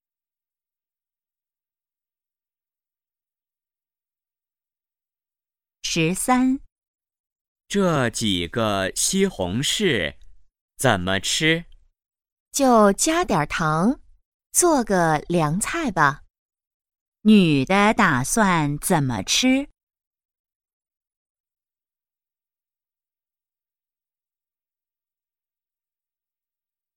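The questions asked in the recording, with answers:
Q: 女的打算怎么吃?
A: 加点糖做凉菜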